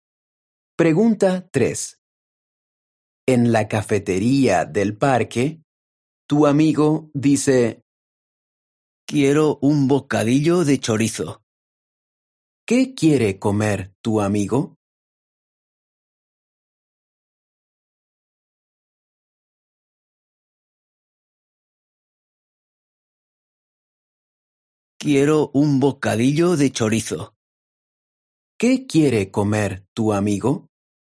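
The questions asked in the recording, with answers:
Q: ¿Qué quiere comer tu amigo?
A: un bocadillo de chorizo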